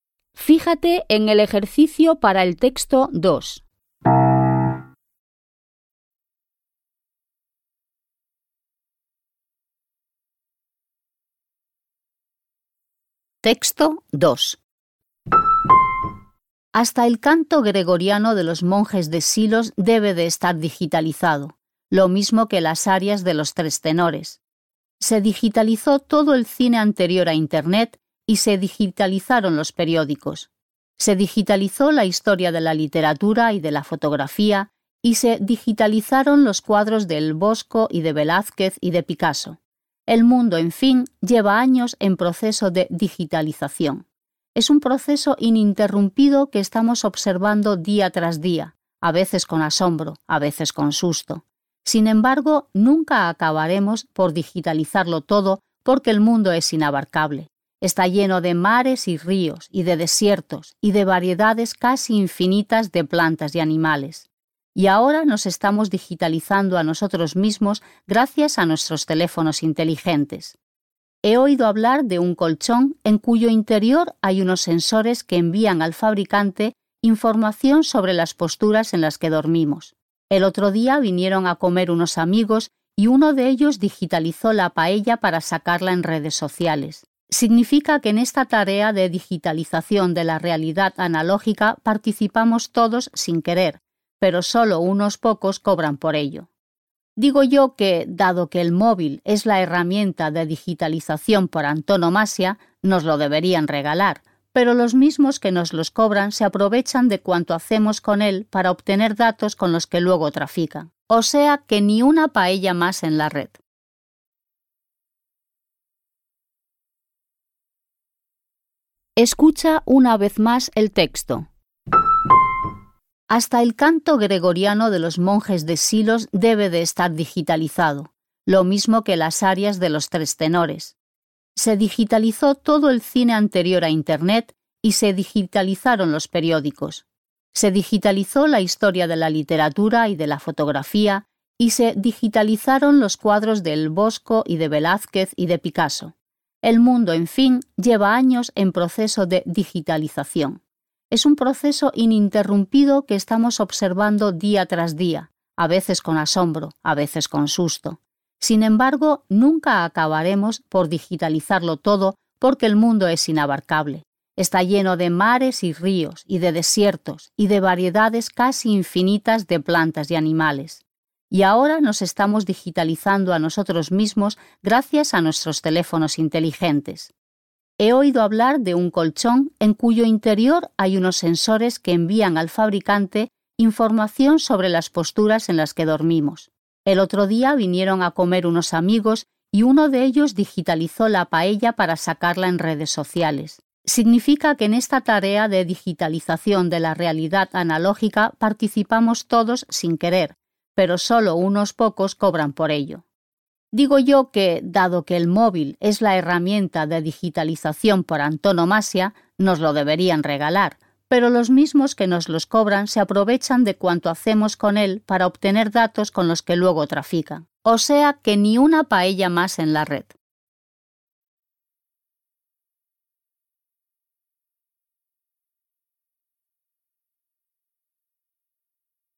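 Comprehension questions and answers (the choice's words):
Vas a escuchar dos textos. Elige la respuesta correcta de entre las cuatro opciones que se ofrecen (A, B, C o D) y márcala con un círculo. Las preguntas 2.1.–2.4. corresponden al Texto 1 y las preguntas 2.5. y 2.6. corresponden al Texto 2. Escucharás la grabación dos veces.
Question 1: Según la hablante, el proceso de digitalización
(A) se realiza de manera continua.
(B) excluye áreas importantes de la vida.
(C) se centra en detectar fenómenos insólitos.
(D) es capaz de abarcar la realidad en su totalidad.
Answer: se realiza de manera continua.

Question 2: La intención de la hablante es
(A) recomendar la ampliación de las bases de datos existentes.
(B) censurar unas prácticas que considera abusivas.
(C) mostrar su entusiasmo por la digitalización.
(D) animar a disfrutar del mundo virtual.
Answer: censurar unas prácticas que considera abusivas.

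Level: Poziom: dwujęzyczny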